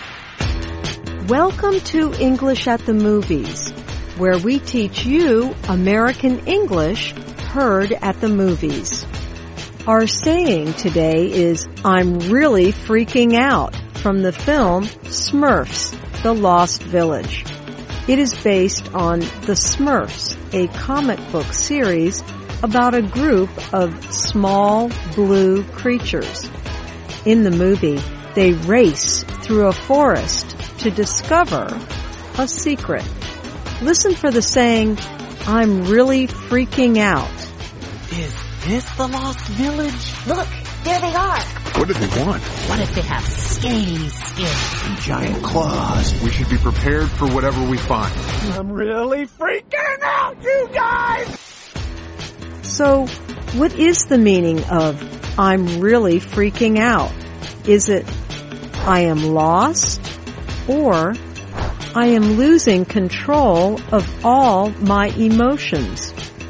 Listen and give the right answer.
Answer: I'm really freaking out means I am losing control of my emotions.